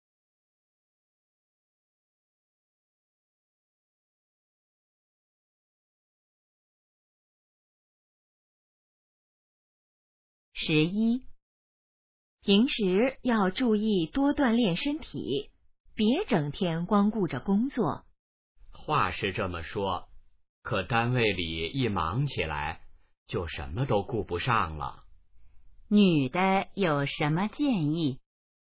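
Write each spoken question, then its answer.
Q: 女的有什么建议?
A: 多锻炼身体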